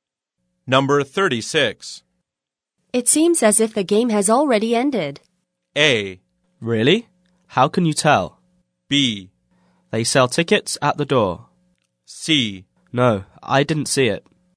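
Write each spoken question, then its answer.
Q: It seems as if the game has already ended.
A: A: Really? How can you tell?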